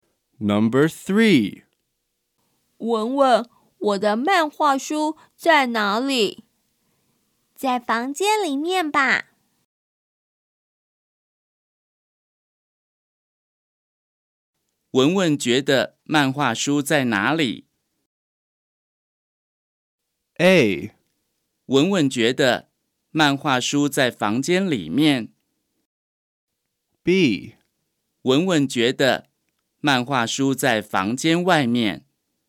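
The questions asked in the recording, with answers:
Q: 文文觉得漫画书在哪里?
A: A: 文文觉得漫画书在房间里面。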